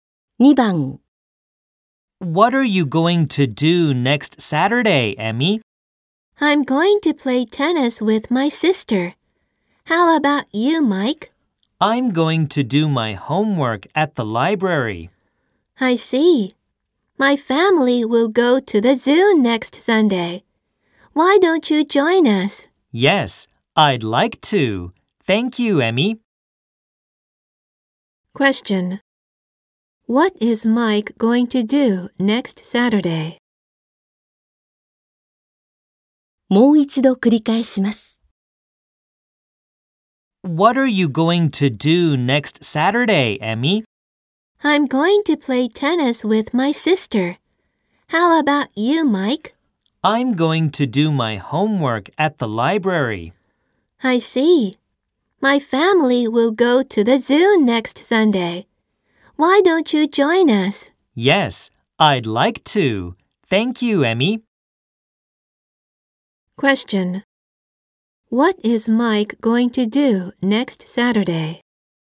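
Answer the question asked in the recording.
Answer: Do his homework at the library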